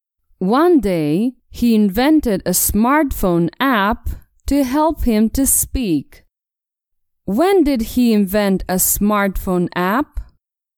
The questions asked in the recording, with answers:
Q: When did he invent a smartphone app?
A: One day, he invented a smartphone app one day.